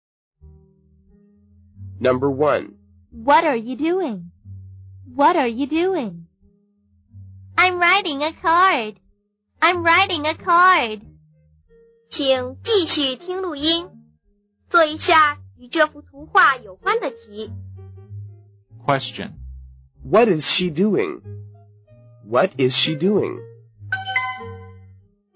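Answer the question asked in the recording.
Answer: She's writing a card.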